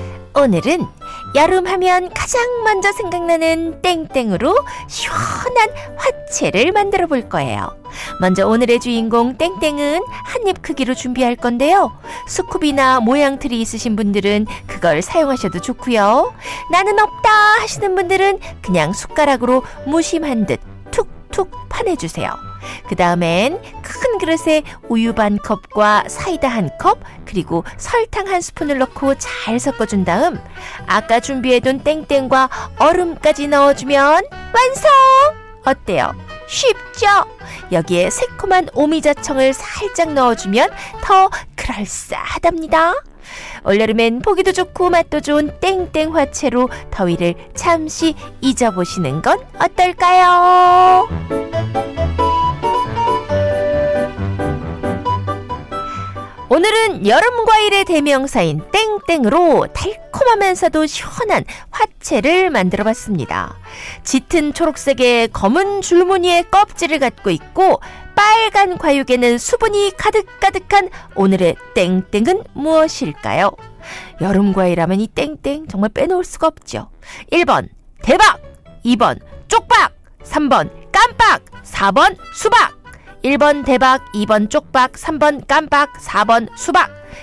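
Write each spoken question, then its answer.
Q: 짙은 초록색의 검은 줄무늬의 껍질을 갖고 있고 빨간 과육에는 수분이 가득가득한 오늘의 땡땡은 무엇일까요?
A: 4: 수박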